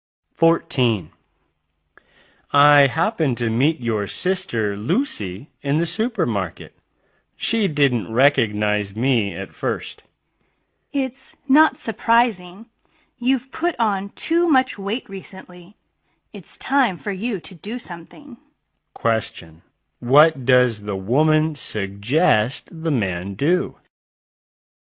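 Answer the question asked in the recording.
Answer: Lose weight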